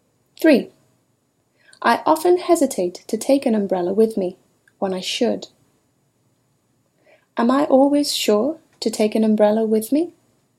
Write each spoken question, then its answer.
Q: Am I always sure to take an umbrella with me?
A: No. Sometimes you hesitate to bring an umbrella with you.